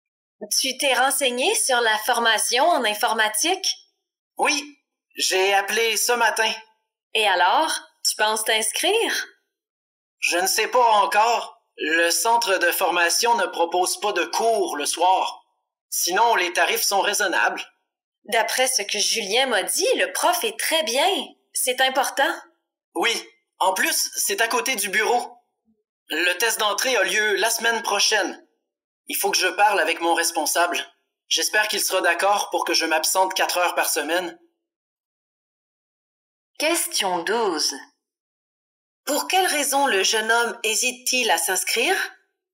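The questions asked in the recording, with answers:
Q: Pour quelle raison le jeune homme hésite-t-il à s'inscrire?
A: Le centre de formation ne propose pas de cours le soir.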